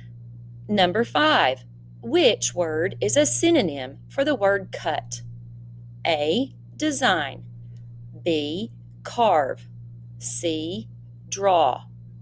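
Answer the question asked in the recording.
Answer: B: carve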